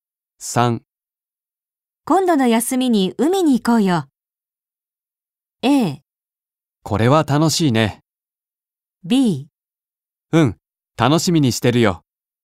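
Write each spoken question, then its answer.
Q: 今度の休みに海に行こうよ。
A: B: うん、楽しみにしてるよ。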